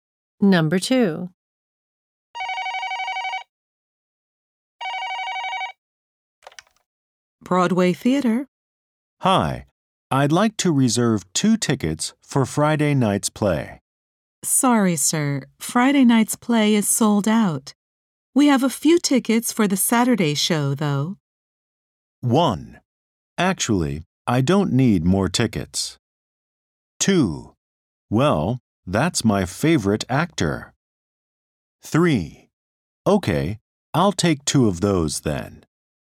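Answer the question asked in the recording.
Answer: 3: Okay, I'll take 2 of those then.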